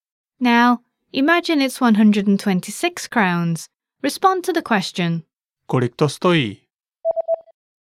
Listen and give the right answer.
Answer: Stojí to 126 korun.